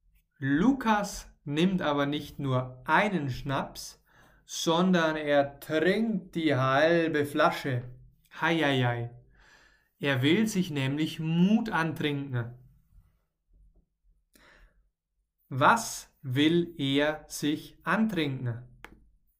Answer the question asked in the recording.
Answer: Mut. Er will sich Mut antrinken.